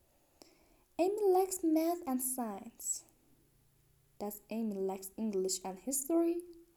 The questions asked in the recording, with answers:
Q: Does Amy like English and history?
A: No, she likes math and science.